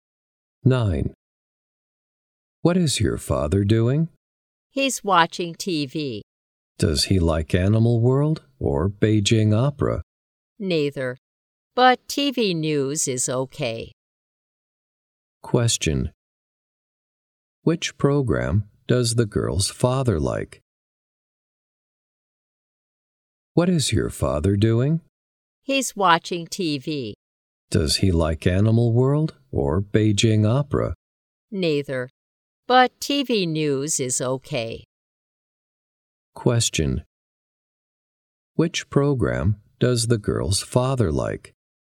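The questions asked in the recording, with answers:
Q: Which program does the girl's father like?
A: TV news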